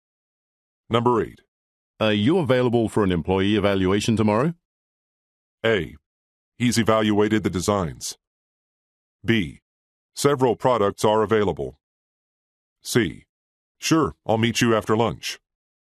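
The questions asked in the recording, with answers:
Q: Are you available for an employee evaluation tomorrow?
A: C: Sure, I'll meet you after lunch.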